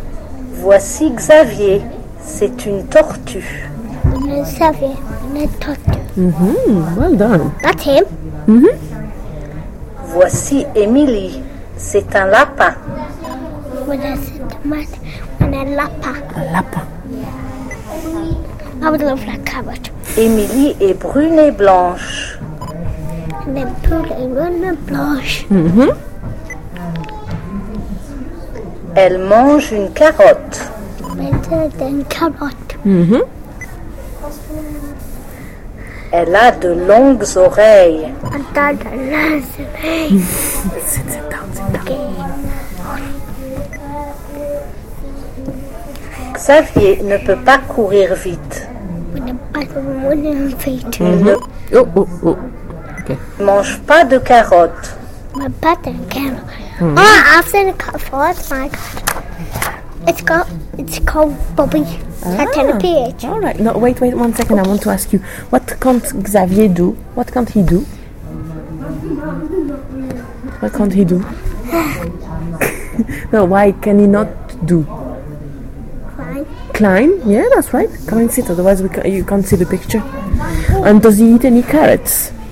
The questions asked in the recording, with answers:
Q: And does he eat any carrots?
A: No? Well done.